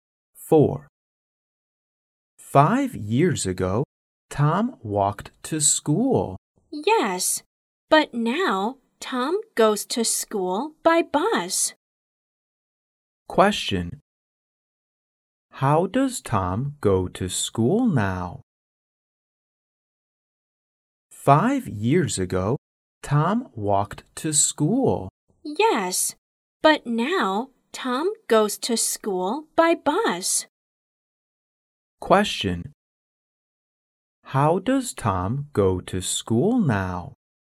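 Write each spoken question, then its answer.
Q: How does Tom go to school now?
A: By bus.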